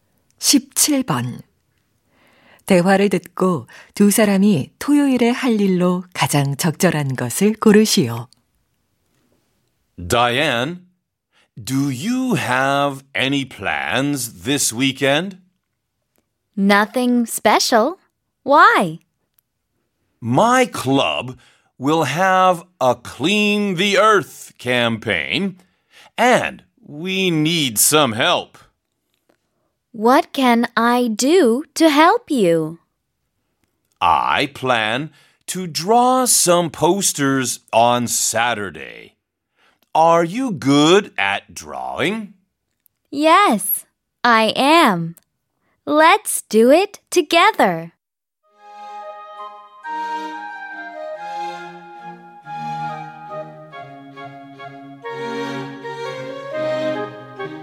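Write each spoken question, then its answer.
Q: 대화를 듣고 두 사람이 토요일에 할 일로 가장 적절한 것을 고르시오.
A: 포스터 그리기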